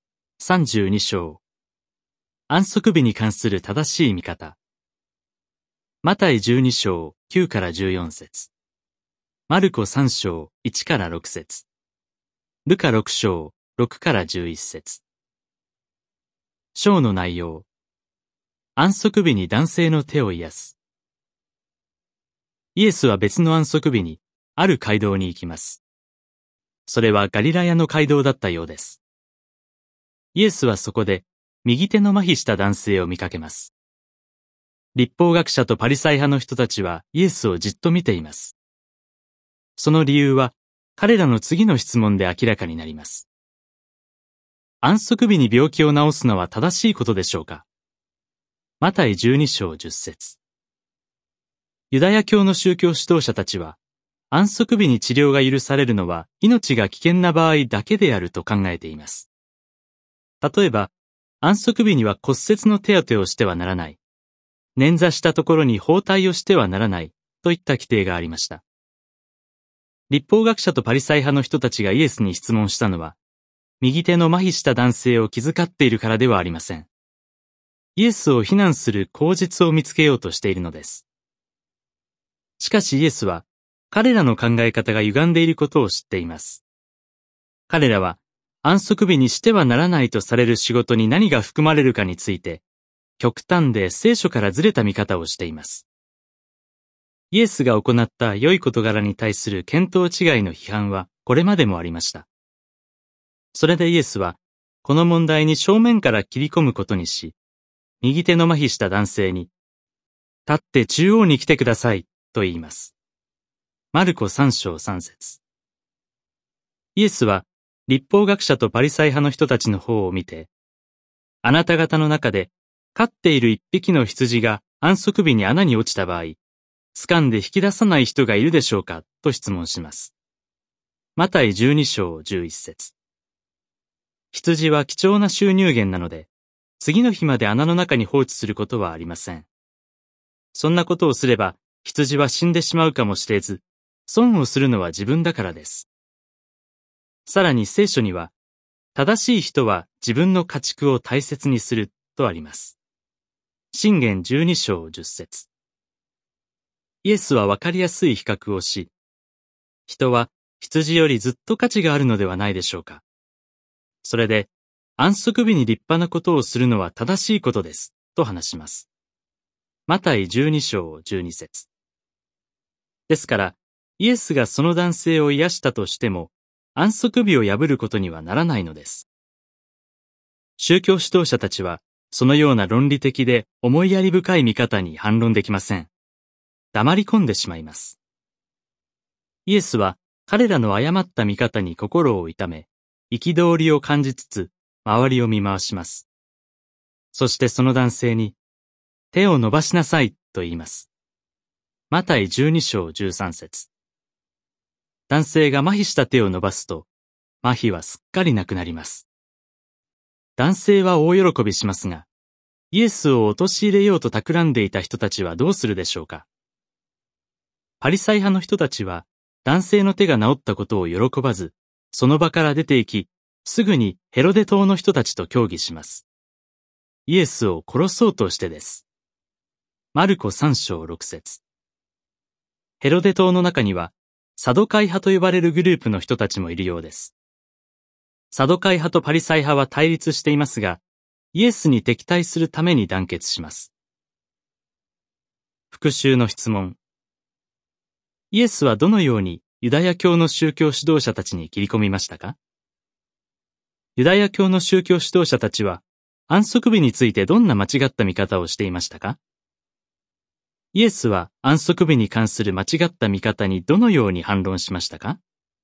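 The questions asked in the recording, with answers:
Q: イエスはどのようにユダヤ教の宗教指導者たちに切り込みましたか?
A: 右手の麻痺した男性を中央に立たせ、安息日に穴に落ちた羊を引き出さない人がいるかと質問した

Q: ユダヤ教の宗教指導者たちは、安息日についてどんな間違った見方をしていましたか?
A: 安息日に治療が許されるのは命が危険な場合だけだと考えていた

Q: イエスは安息日に関する間違った見方にどのように反論しましたか?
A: 人は羊よりずっと価値があるので、安息日に立派なことをするのは正しいと話した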